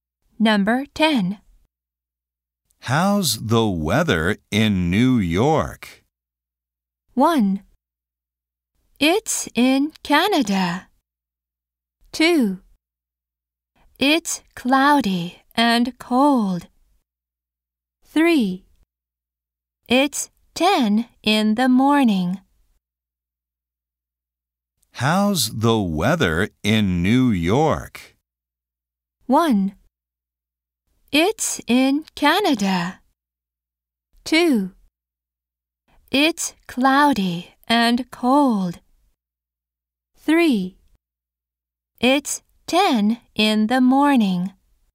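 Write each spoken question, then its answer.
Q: How's the weather in New York?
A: 2: It's cloudy and cold.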